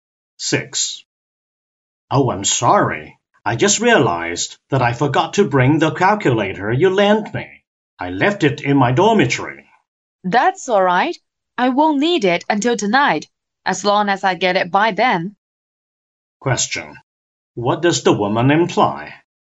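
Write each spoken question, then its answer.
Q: What does the woman imply?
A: It's fine if he brings the calculator back by tonight.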